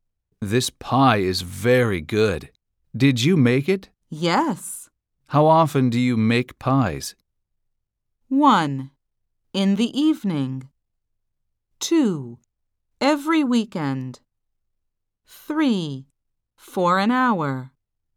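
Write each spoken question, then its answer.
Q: How often do you make pies?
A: 2: Every weekend.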